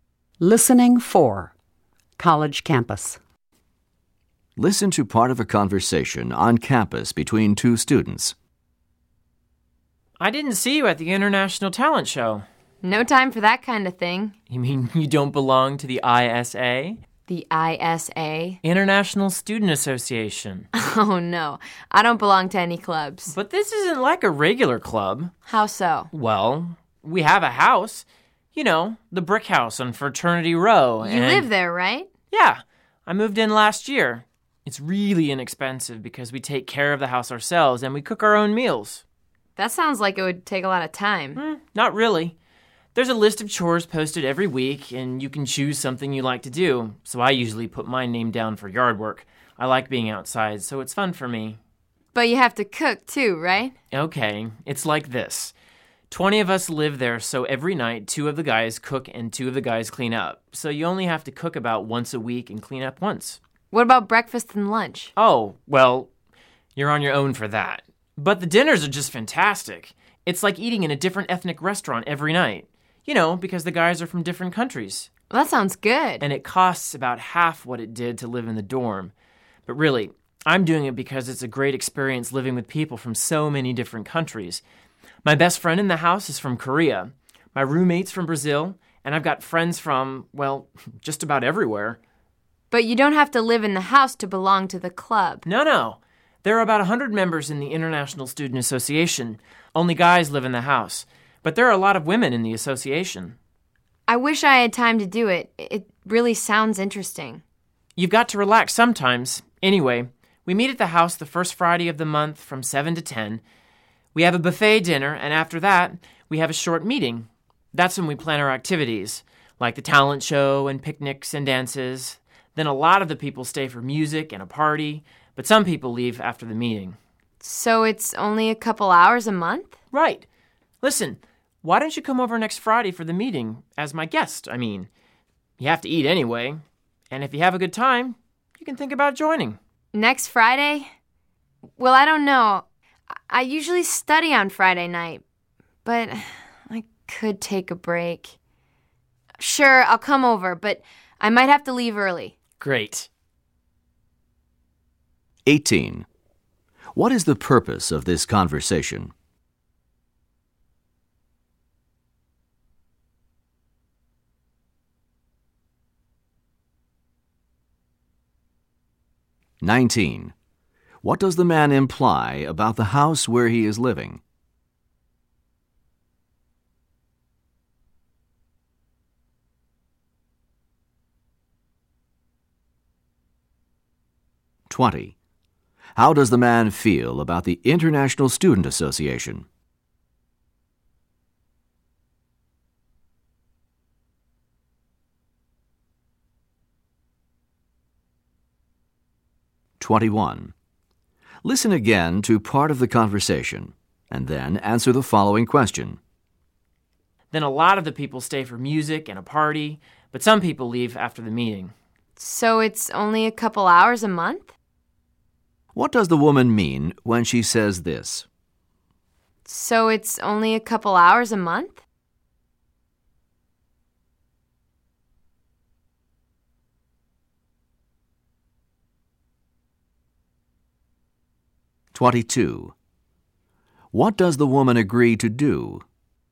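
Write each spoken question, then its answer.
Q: What is the purpose of this conversation?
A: The man is inviting the woman to join the International Student Association

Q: What does the woman agree to do?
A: Go to the meeting next Friday as his guest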